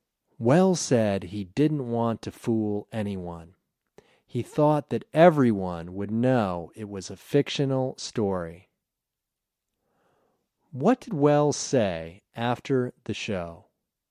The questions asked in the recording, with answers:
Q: What did Welles say after the show?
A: He said he didn't want to fool anyone.